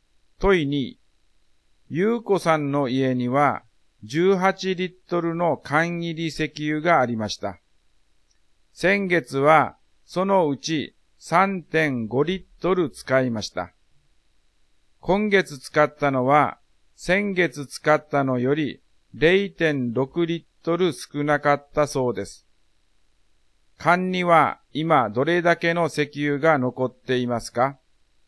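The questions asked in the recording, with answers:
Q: 缶には今どれだけの石油が残っていますか?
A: 11.6リットル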